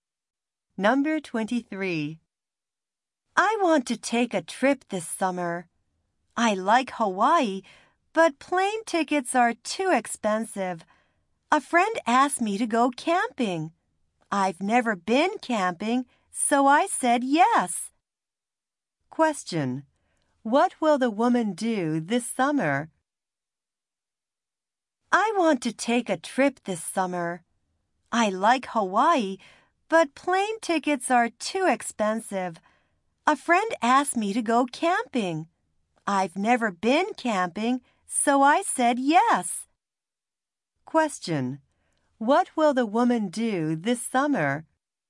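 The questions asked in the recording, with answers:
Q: What will the woman do this summer?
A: Go camping with a friend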